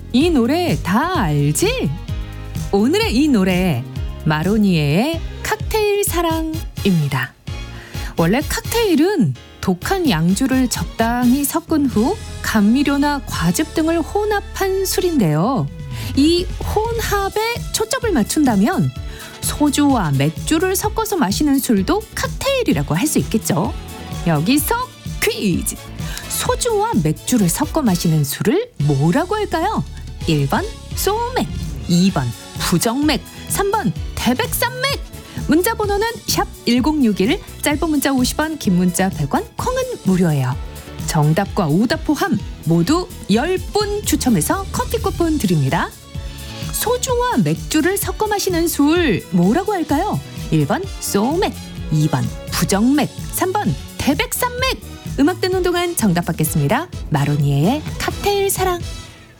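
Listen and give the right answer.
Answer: 1: 소맥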